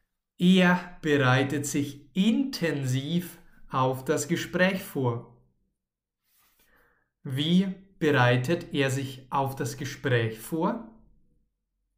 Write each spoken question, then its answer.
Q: Wie bereitet er sich auf das Gespräch vor?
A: Intensiv, das heißt sehr, sehr stark.